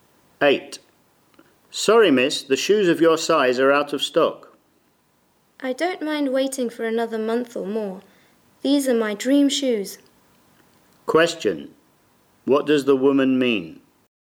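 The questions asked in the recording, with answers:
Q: What does the woman mean?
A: She is willing to wait for the shoes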